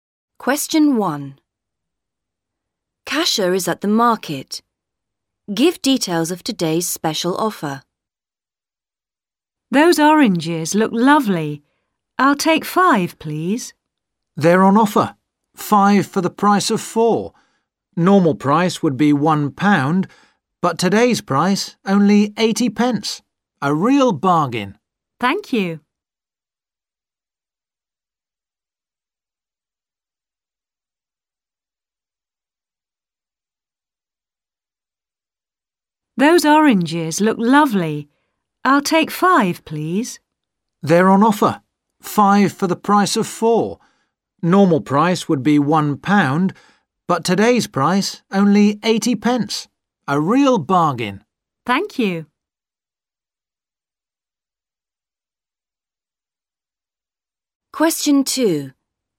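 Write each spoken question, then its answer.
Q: Give details of today's special offer.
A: Oranges: 5 for the price of 4 (80 pence instead of £1)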